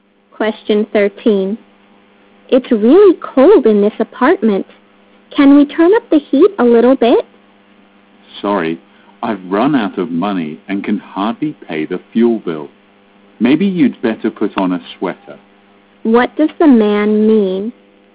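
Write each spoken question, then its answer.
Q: What does the man mean?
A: He can't afford to turn up the heat, so the woman should put on a sweater.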